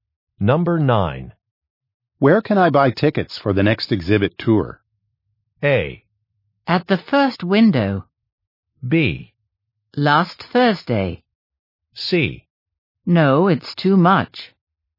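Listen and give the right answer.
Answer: A: At the first window.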